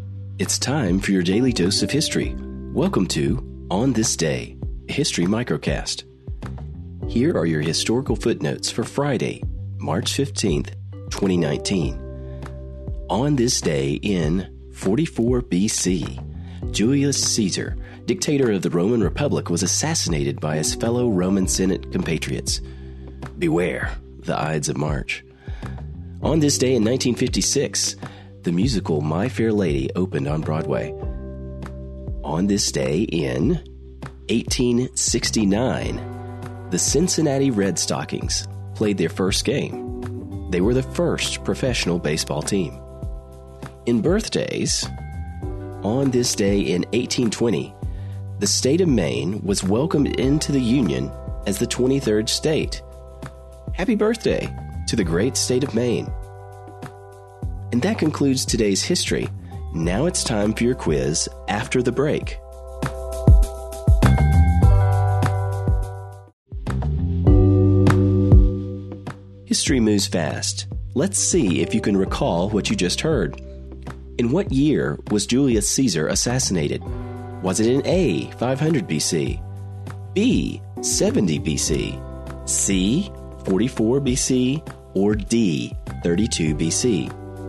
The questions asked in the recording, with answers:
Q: In what year was Julius Caesar assassinated?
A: The answer is C, 44 BC.